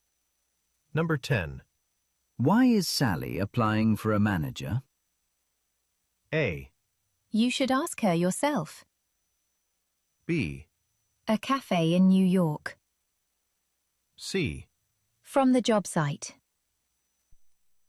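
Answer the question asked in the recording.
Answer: A: You should ask her yourself.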